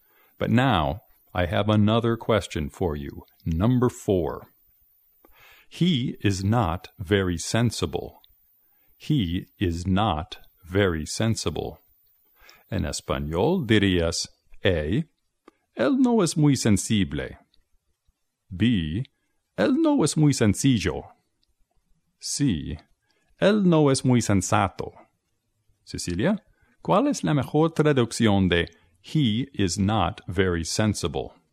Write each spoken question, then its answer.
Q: Cecilia, ¿cuál es la mejor traducción de He is not very sensible?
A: As I recall, sensible in English means sensato.